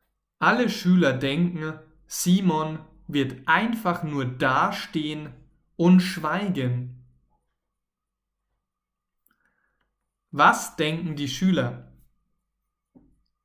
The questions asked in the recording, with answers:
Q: Was denken die Schüler?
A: Sie denken, Simon wird einfach nur dastehen und dann schweigen.